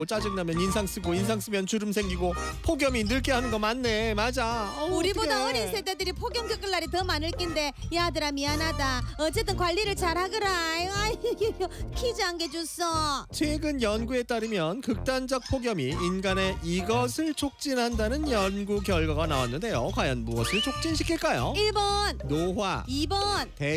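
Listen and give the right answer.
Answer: 1번: 노화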